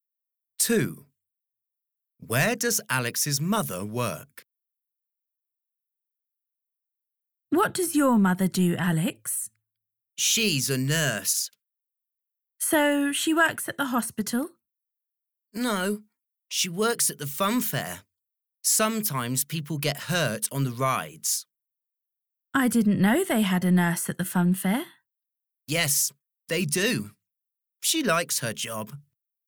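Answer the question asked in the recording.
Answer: At the fun fair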